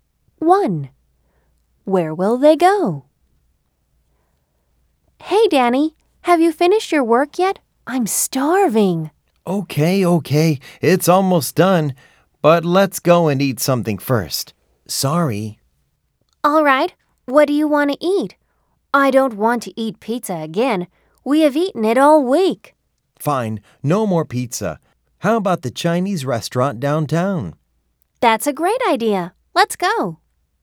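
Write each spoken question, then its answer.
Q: Where will they go?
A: the Chinese restaurant downtown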